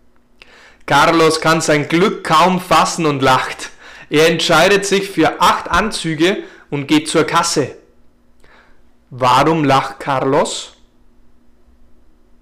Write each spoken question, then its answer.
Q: Warum lacht Carlos?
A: Er lacht, weil er sein Glück kaum fassen kann.